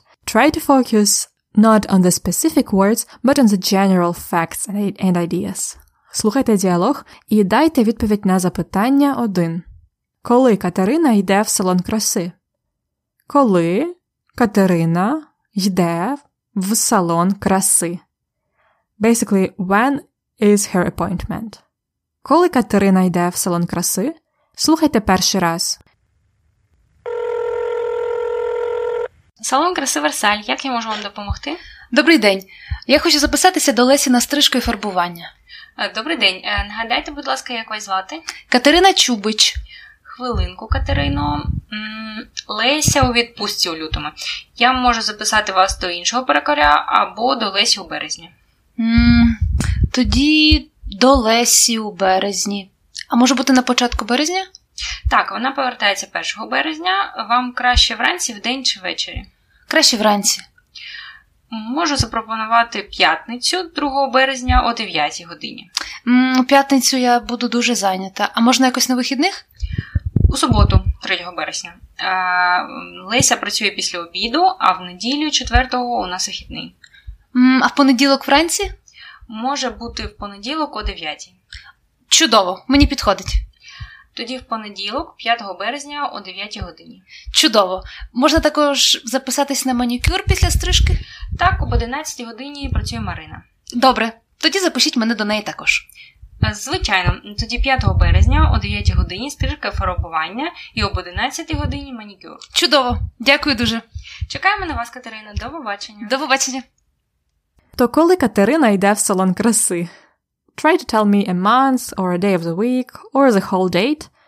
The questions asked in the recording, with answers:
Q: Коли Катерина йде в салон краси?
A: Вона йде в салон краси в понеділок, 5 березня.